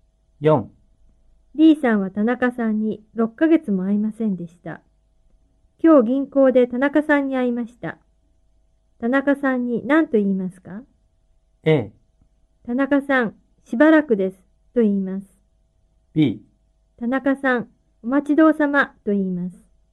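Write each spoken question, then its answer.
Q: 田中さんに何と言いますか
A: A: 田中さん、しばらくです、と言います。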